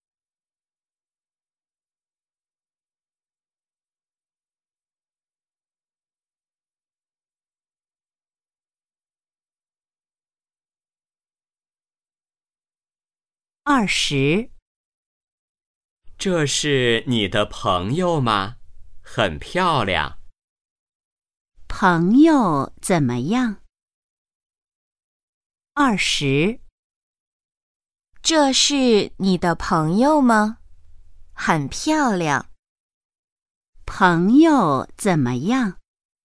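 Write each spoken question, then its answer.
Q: 朋友怎么样?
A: 很漂亮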